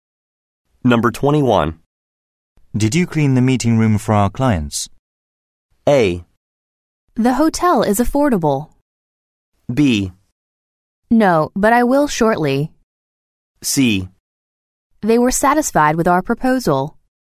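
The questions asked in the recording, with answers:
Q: Did you clean the meeting room for our clients?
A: B: No, but I will shortly.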